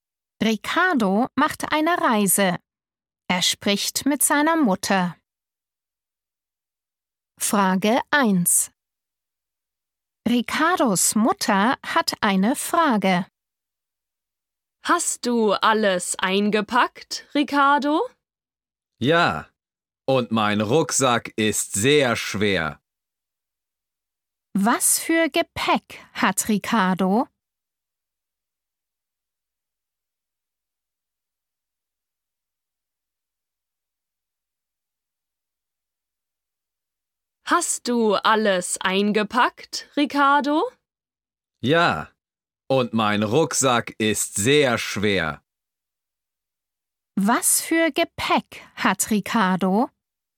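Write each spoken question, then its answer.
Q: Was für Gepäck hat Ricardo?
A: einen Rucksack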